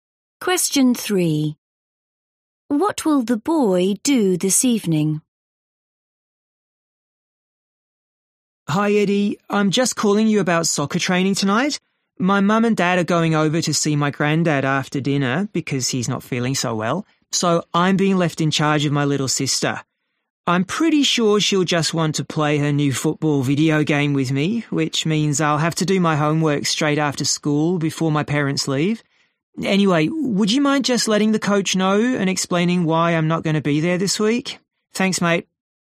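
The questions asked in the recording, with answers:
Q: What will the boy do this evening?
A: Look after his little sister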